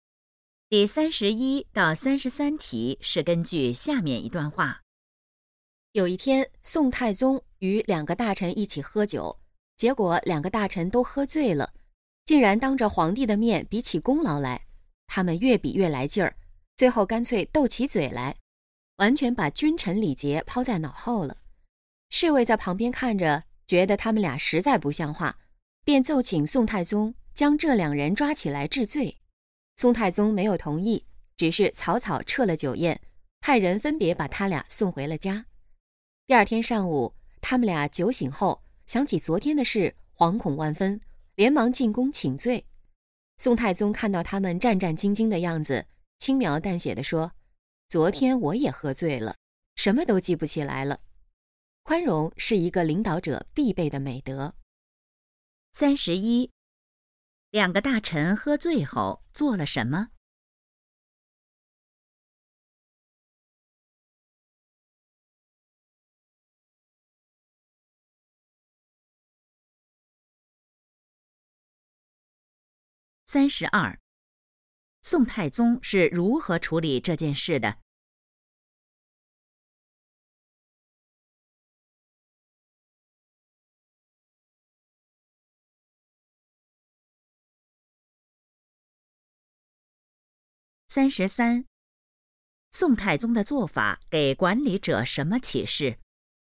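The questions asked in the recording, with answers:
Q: 两个大臣喝醉后做了什么?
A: 比功劳,斗起嘴来

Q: 宋太宗是如何处理这件事的?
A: 没有治罪,说自己也喝醉了记不起来

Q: 宋太宗的做法给管理者什么启示?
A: 领导者要宽容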